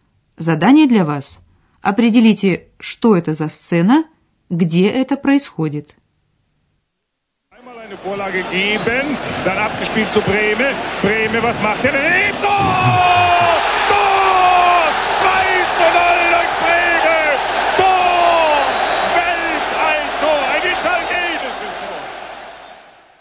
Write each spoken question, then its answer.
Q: Определите, что это за сцена, где это происходит.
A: речь идет о сцене из спортивной жизни, то есть о футбольном матче на стадионе.